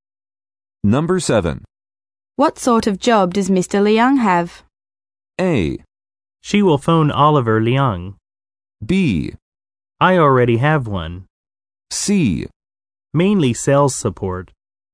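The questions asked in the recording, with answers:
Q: What sort of job does Mr. Liang have?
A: C: Mainly sales support.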